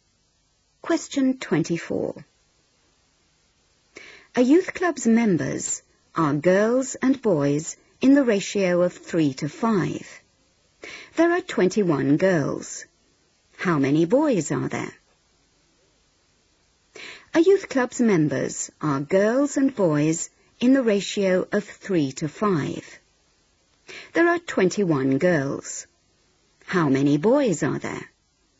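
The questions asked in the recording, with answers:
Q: There are 21 girls. How many boys are there?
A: 35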